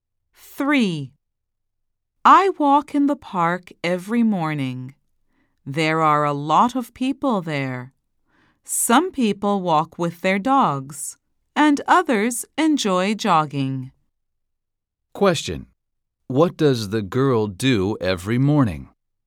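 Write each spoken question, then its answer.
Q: What does the girl do every morning?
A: She walks in the park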